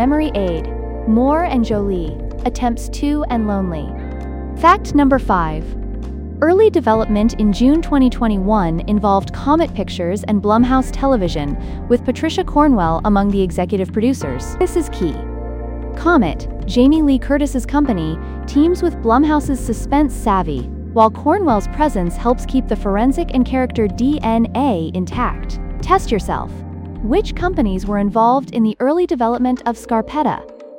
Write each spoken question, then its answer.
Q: Which companies were involved in the early development of Scarpetta?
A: Comet Pictures and Blumhouse Television.